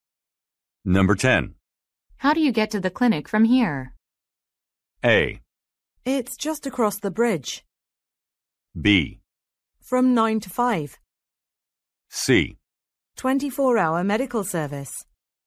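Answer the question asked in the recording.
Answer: A: It's just across the bridge.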